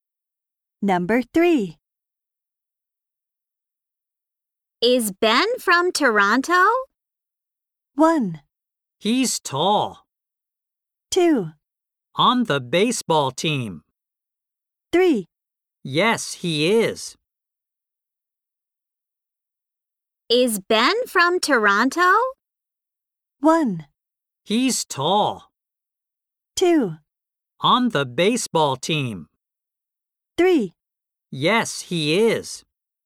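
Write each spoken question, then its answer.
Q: Is Ben from Toronto?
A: 3: Yes, he is.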